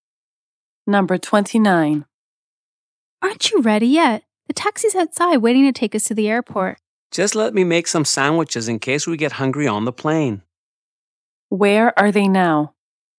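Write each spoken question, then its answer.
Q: Where are they now?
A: At home, about to leave for the airport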